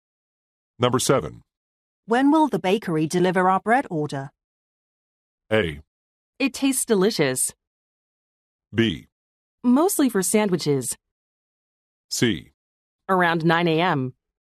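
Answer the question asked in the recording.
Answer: C: Around 9 a.m.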